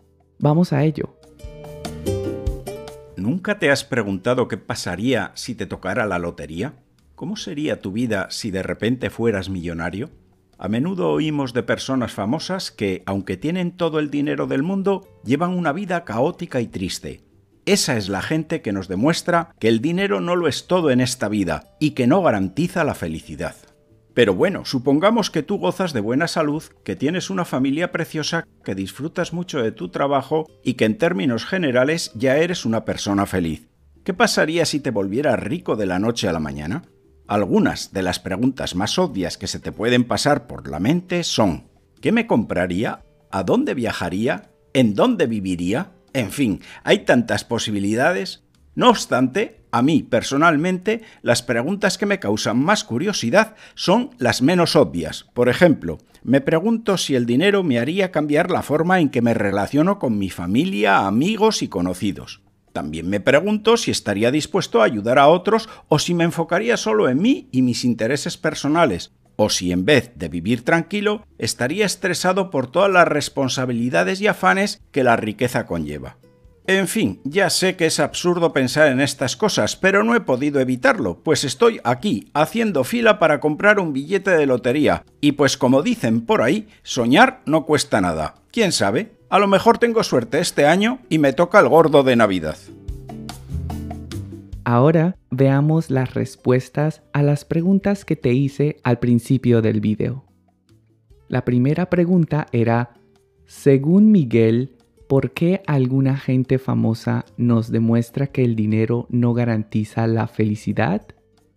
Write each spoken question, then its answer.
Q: según Miguel, ¿Por qué alguna gente famosa nos demuestra que el dinero no garantiza la felicidad?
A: porque aunque tienen todo el dinero del mundo, llevan una vida caótica y triste.